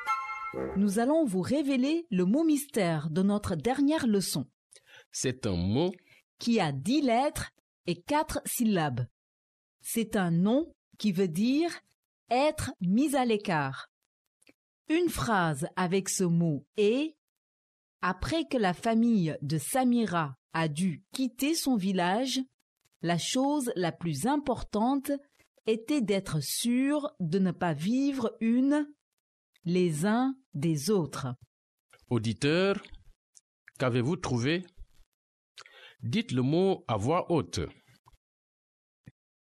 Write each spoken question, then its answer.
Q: Auditeur, qu'avez-vous trouvé?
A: Séparation.